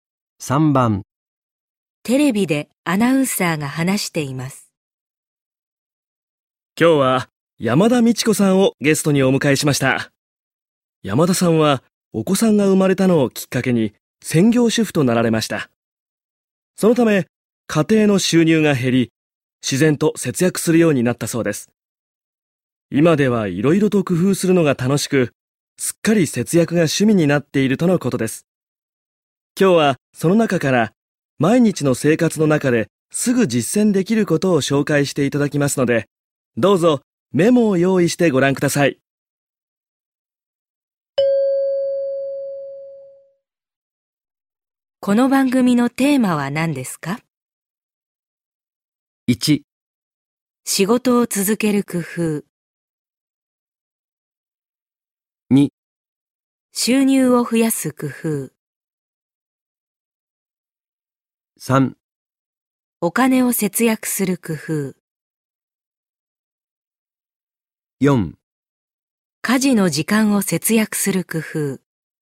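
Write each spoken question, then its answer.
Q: この番組のテーマは何ですか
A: 3: お金を節約する工夫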